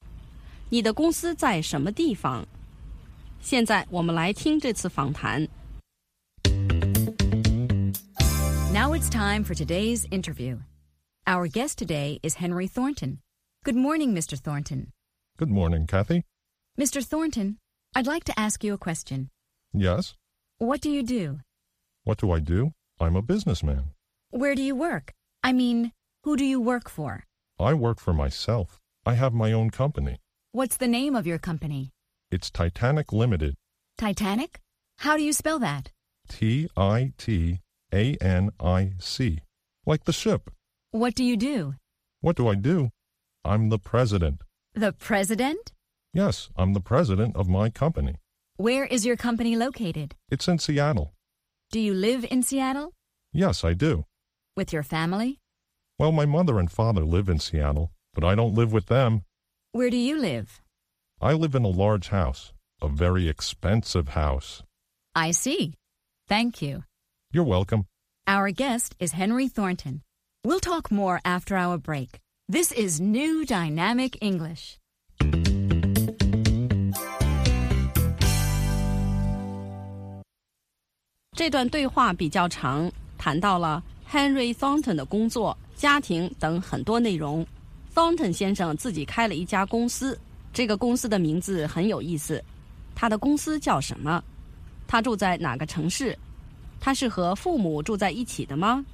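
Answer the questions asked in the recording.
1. Henry 的公司叫 Titanic Limited
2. 西雅图(Seattle)
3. 不是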